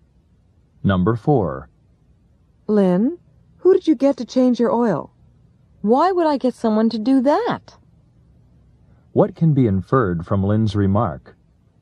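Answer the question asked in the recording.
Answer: She changed the oil herself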